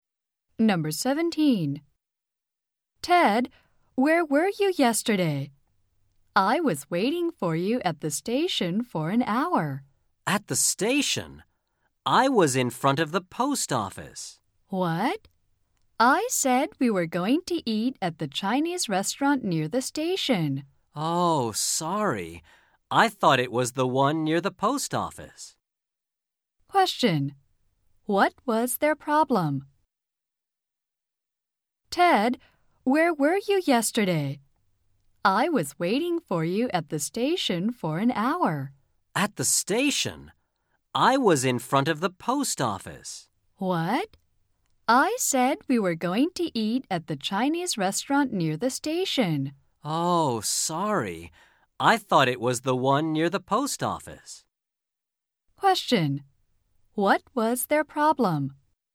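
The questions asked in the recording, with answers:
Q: What was their problem?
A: They waited at different places; Ted thought they were meeting at the restaurant near the post office, not the one near the station.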